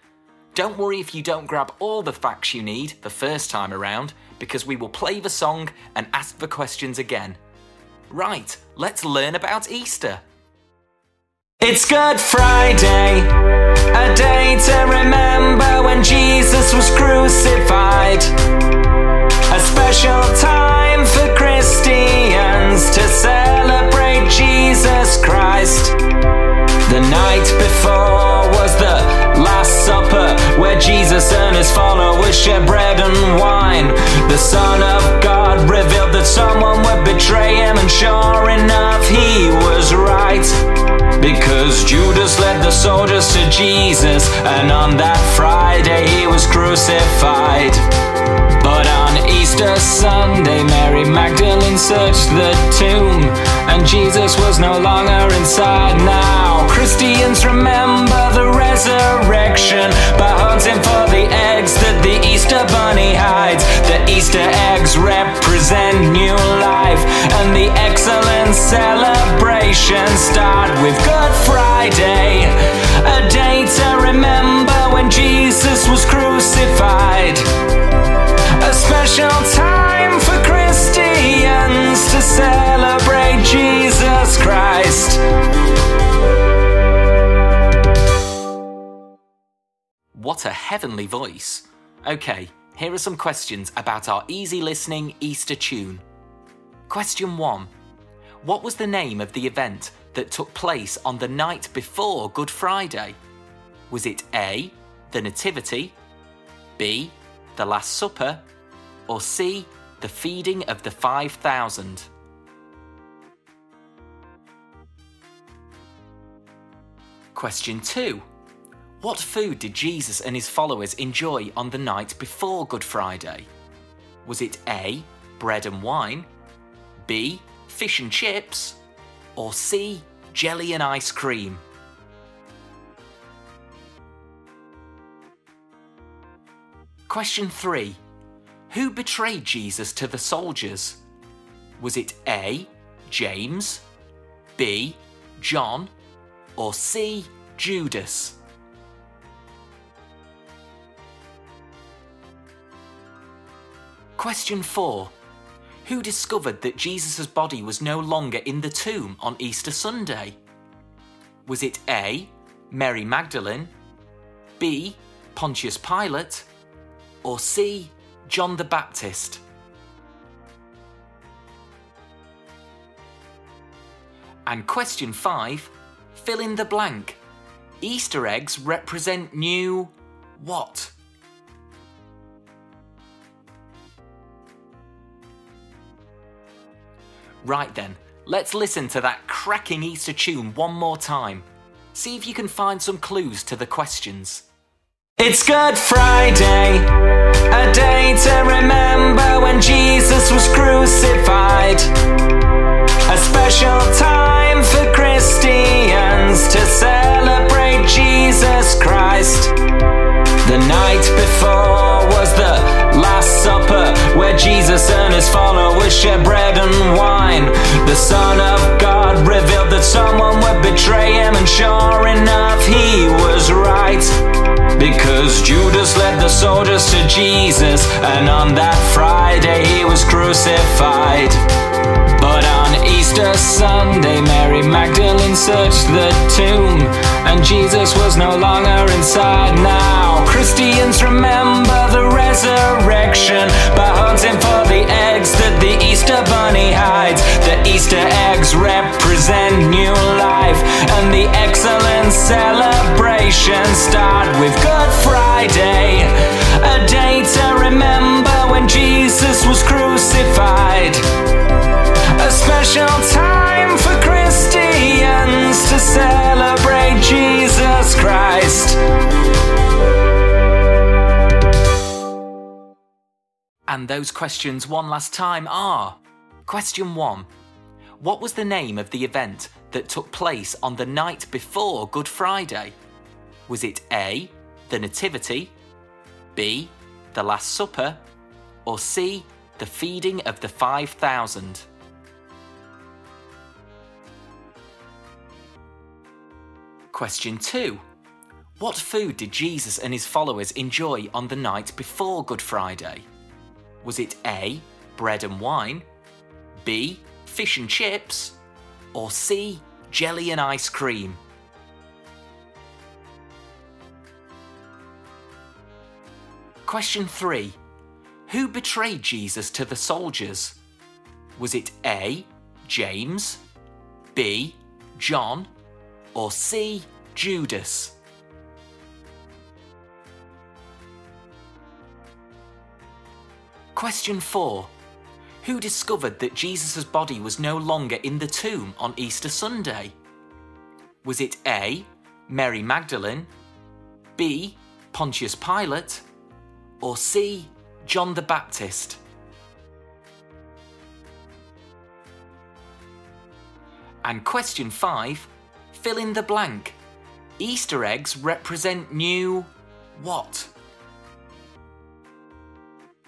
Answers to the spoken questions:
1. So the answer is B, the Last Supper.
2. The answer is A, bread and wine.
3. So the answer is C, Judas.
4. So the answer is A, Mary Magdalene.
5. And the answer is life.